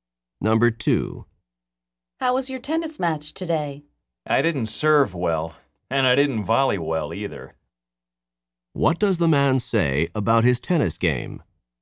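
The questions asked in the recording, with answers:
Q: What does the man say about his tennis game?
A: He played poorly; he neither served nor volleyed well.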